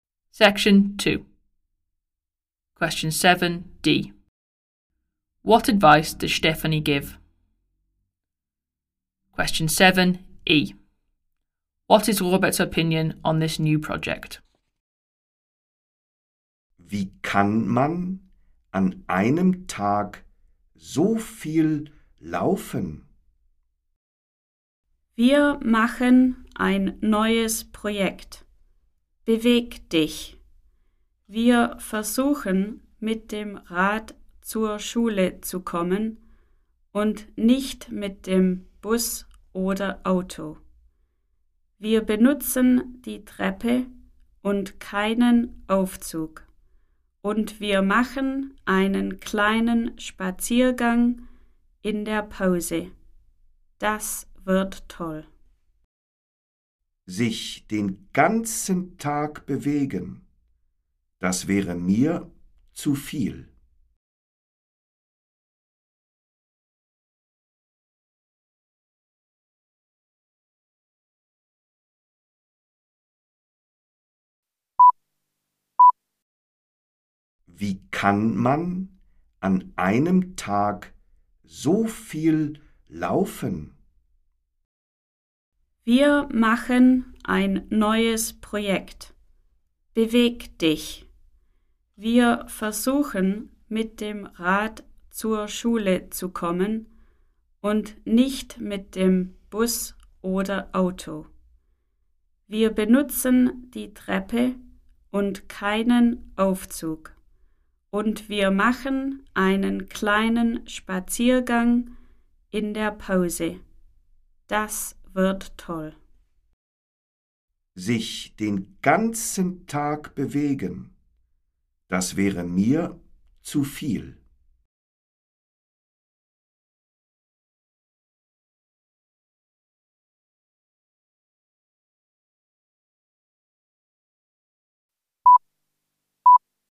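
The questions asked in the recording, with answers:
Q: What advice does Stephanie give?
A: Cycle to school, use the stairs, take a walk at break

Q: What is Robert's opinion on this new project?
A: Moving all day would be too much for him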